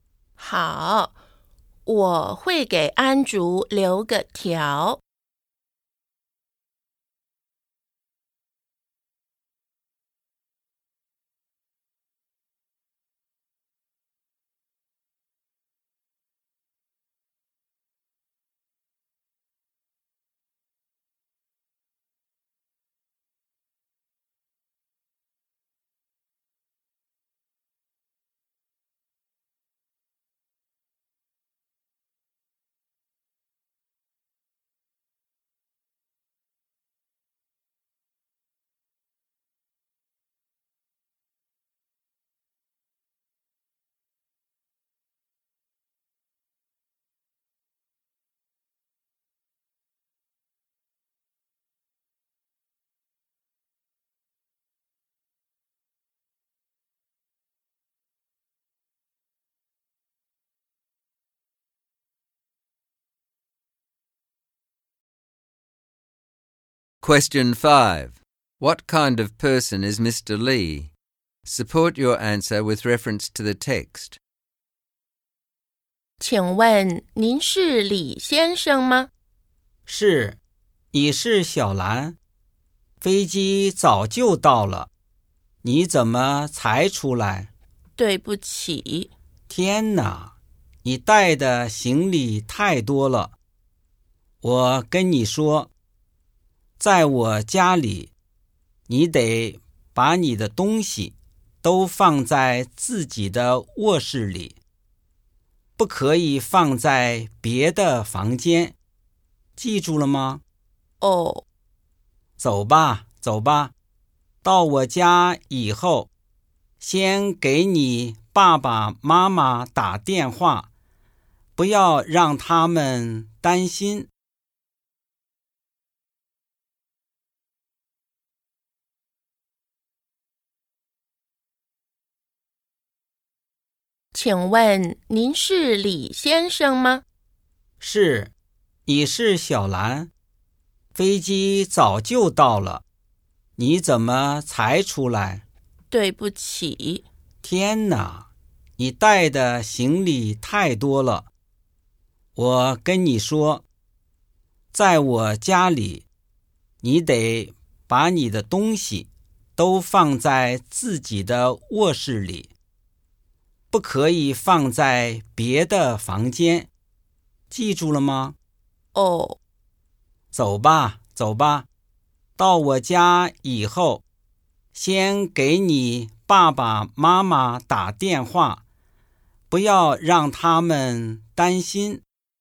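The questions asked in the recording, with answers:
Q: What kind of person is Mr. Lee? Support your answer with reference to the text.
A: He is strict and impatient but also caring. He complains that she was slow and brought too much luggage, and he sets rules about her things, but he tells her to call her parents so they won't worry.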